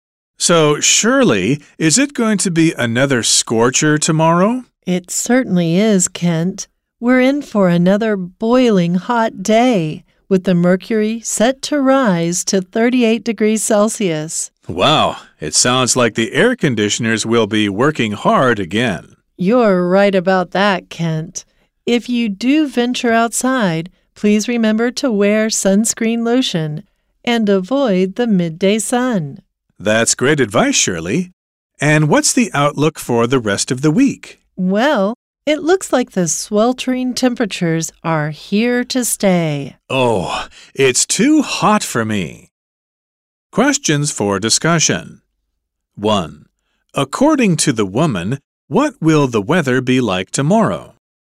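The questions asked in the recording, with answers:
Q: According to the woman, what will the weather be like tomorrow?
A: Boiling hot, up to 38 degrees Celsius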